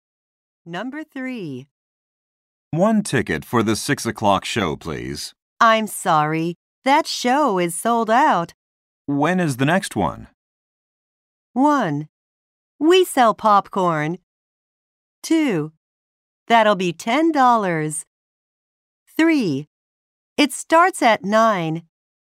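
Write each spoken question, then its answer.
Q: When is the next one?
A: 3: It starts at 9.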